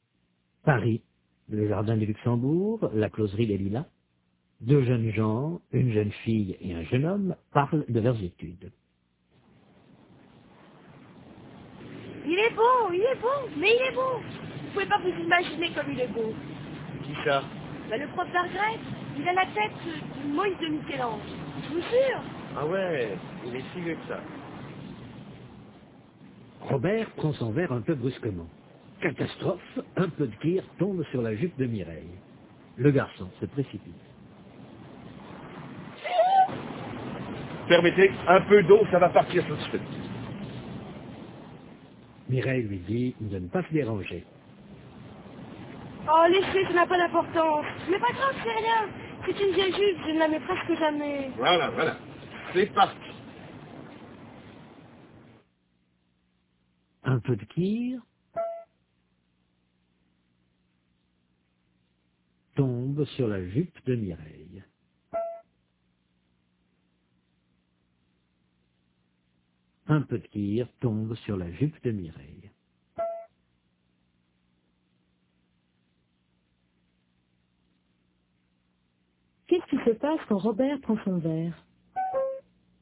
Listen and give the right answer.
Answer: Un peu de kir tombe sur la jupe de Mireille.